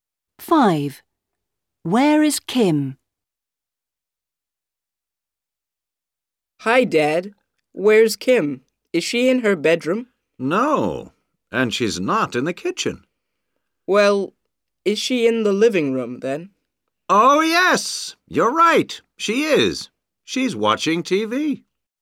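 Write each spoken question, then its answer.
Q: Where is Kim?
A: In the living room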